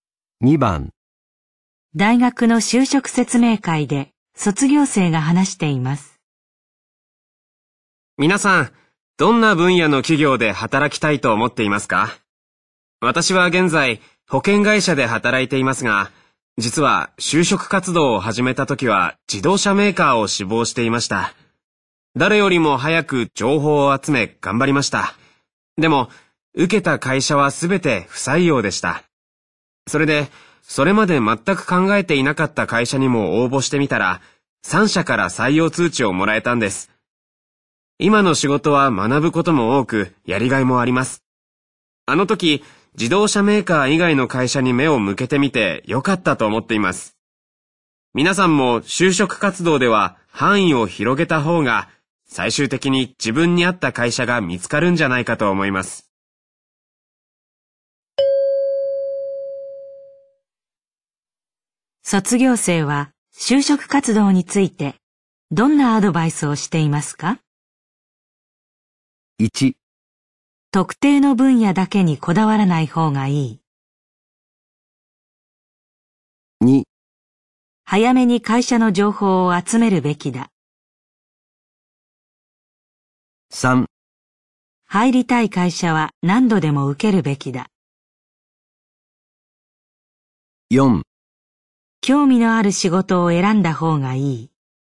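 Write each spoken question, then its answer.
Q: 卒業生は就職活動についてどんなアドバイスをしていますか?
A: 1: 特定の分野だけにこだわらない方がいい。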